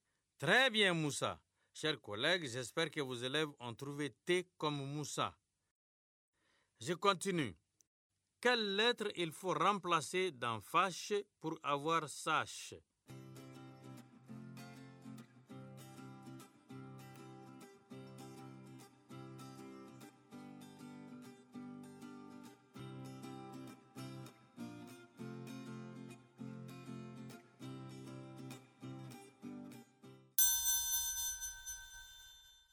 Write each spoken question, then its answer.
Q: Je continue. Quelle lettre il faut remplacer dans fâche pour avoir sache?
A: Monsieur, c'est la lettre F.